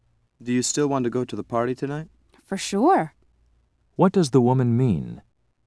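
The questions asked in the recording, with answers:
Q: What does the woman mean?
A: She definitely still wants to go to the party.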